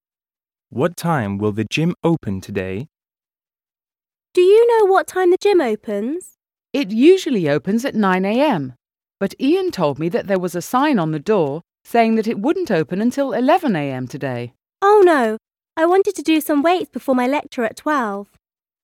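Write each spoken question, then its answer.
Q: What time will the gym open today?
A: 11 a.m.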